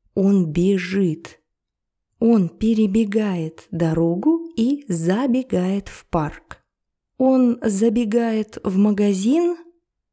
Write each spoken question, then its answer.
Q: Он забегает в магазин?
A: Нет, он забегает в парк.